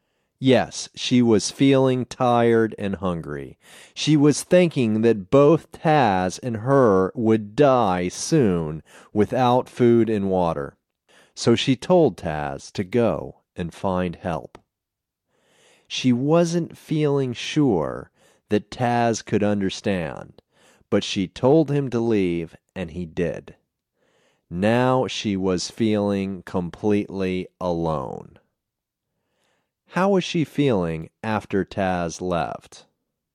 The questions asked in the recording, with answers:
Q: How was she feeling after Taz left?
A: She was feeling completely alone.